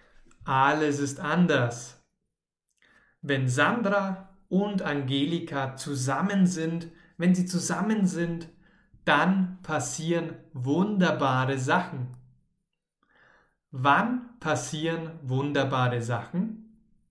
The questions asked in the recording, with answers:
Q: Wann passieren wunderbare Sachen?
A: wenn Sandro und Angelika zusammen sind.